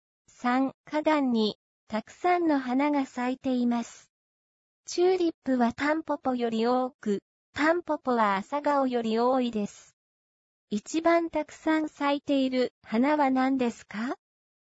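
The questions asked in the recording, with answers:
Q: 一番たくさん咲いている花は何ですか?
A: チューリップ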